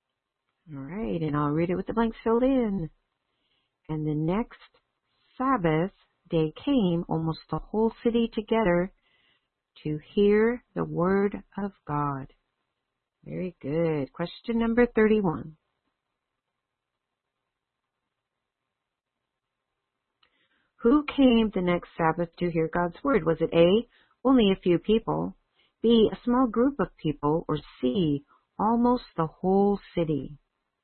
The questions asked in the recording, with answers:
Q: Who came the next Sabbath to hear God's word?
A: Very good. The answer is C.